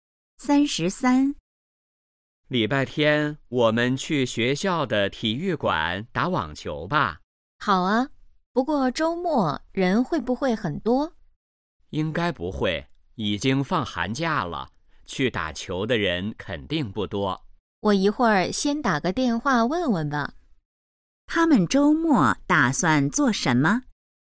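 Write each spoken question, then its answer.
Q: 他们周末打算做什么?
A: 打网球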